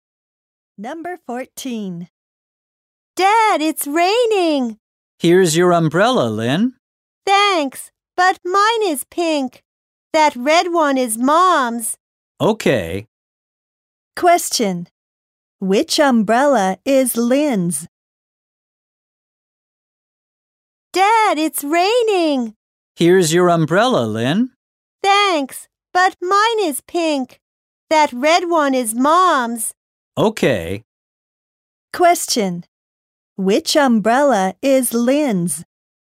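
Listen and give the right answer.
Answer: The pink one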